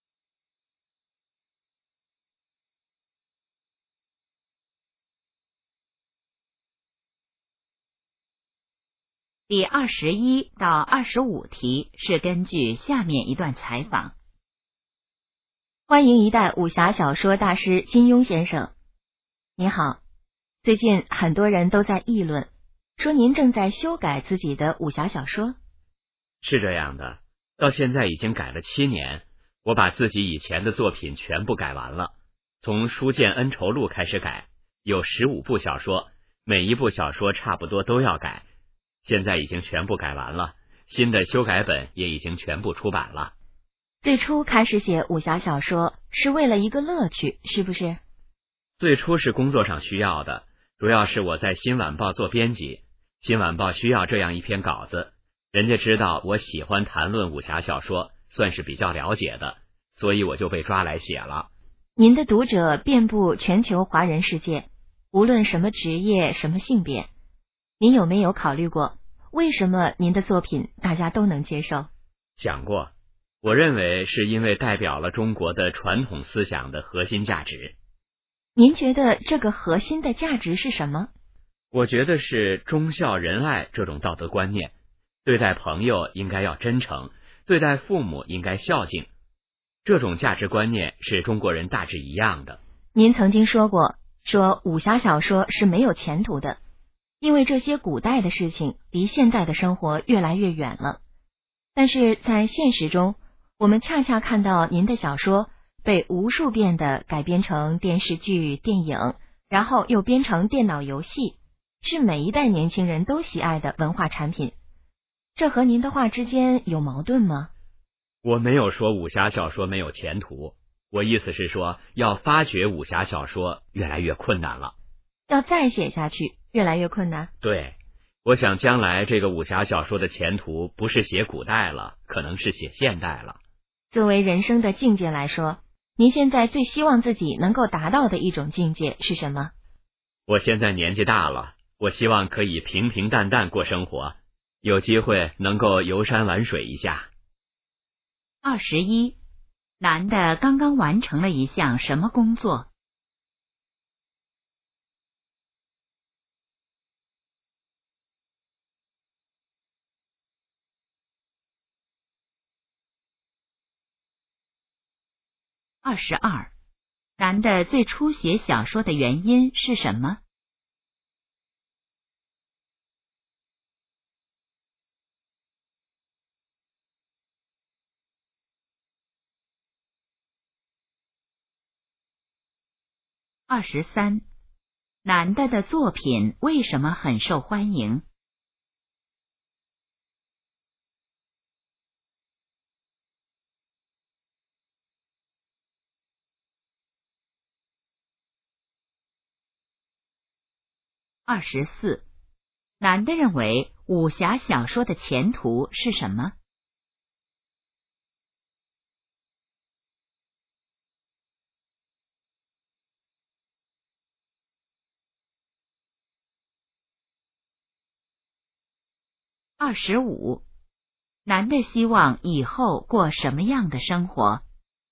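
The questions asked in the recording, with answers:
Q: 男的刚刚完成了一项什么工作?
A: 修改自己以前的武侠小说

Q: 男的最初写小说的原因是什么?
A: 工作需要,新晚报需要稿子

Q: 男的的作品为什么很受欢迎?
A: 代表了中国传统思想的核心价值

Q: 男的认为武侠小说的前途是什么?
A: 可能是写现代

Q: 男的希望以后过什么样的生活?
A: 平平淡淡,游山玩水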